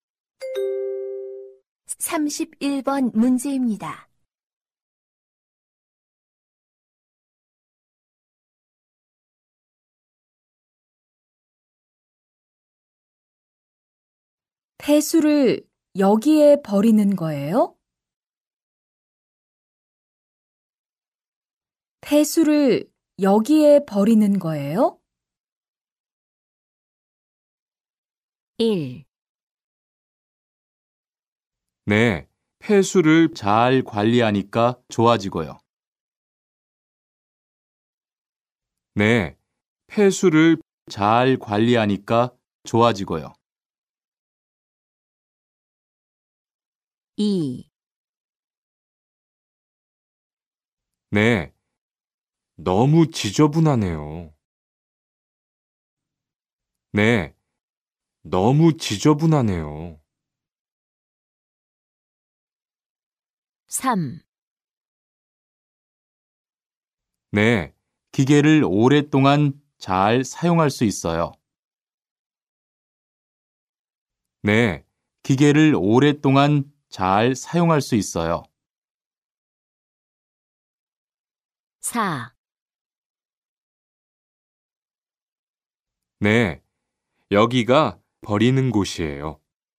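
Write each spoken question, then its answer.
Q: 폐수를 여기에 버리는 거예요?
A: 4: 네, 여기가 버리는 곳이에요.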